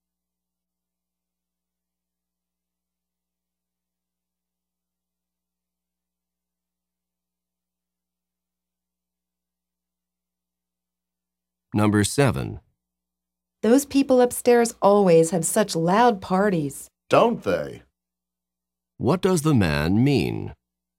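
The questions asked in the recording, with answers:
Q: What does the man mean?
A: He agrees the upstairs neighbors have loud parties.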